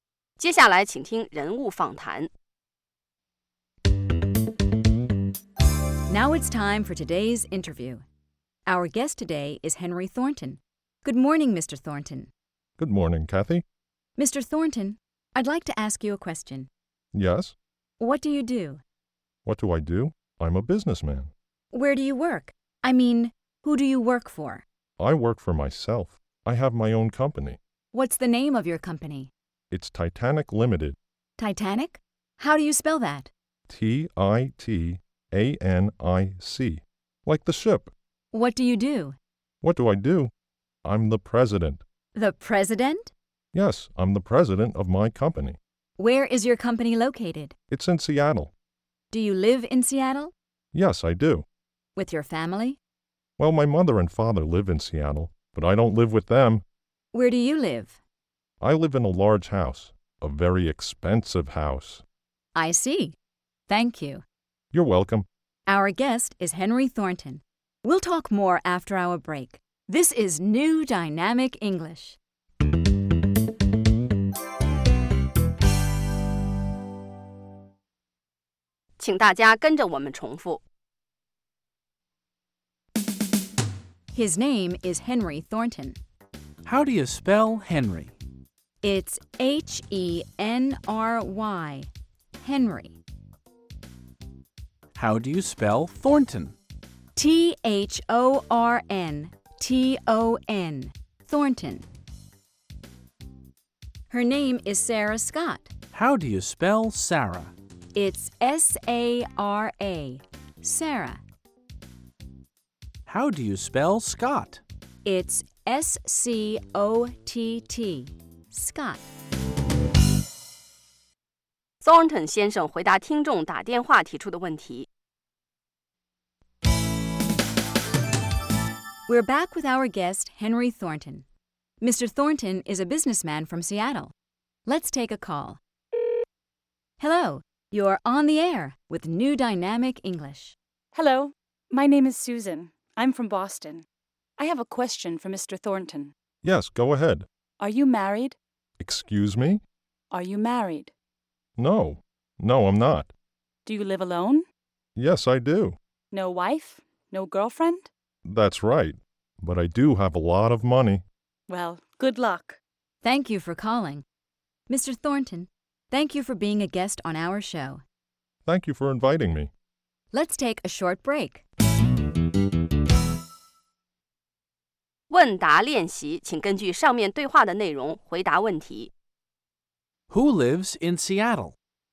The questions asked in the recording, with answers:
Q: Who lives in Seattle?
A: Henry Thornton lives in Seattle.